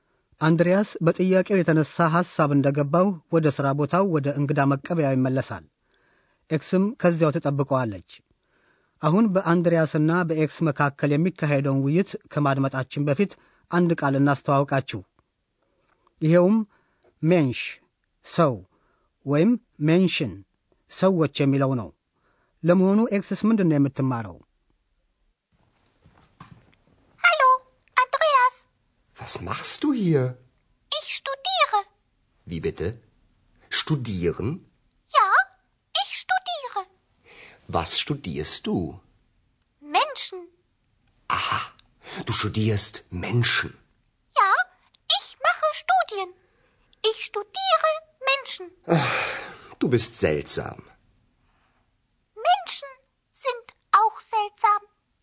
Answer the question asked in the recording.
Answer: ኤክስ የምታጠናው እንግዲህ ሰዎችን መሆኑ ነው።